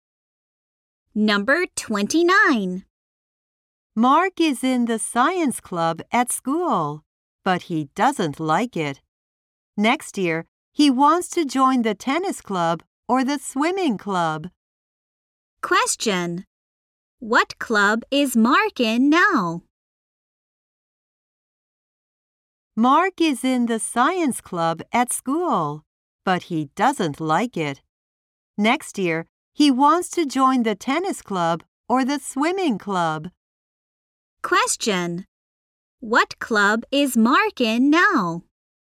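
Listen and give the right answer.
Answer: The science club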